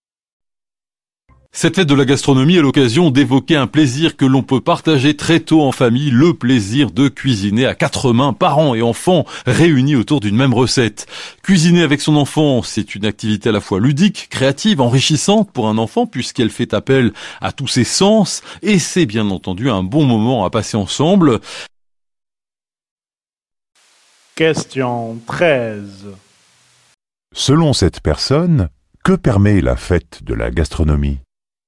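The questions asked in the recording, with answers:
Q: Selon cette personne, que permet la fête de la gastronomie ?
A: Partager le plaisir de cuisiner en famille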